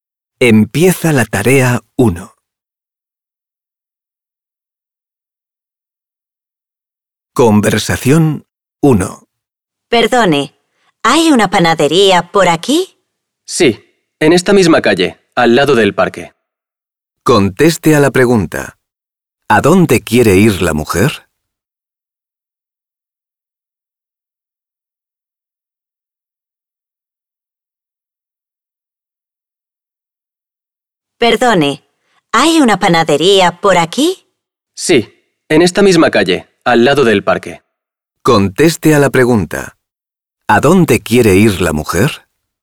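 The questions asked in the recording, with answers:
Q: ¿A dónde quiere ir la mujer?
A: A una panadería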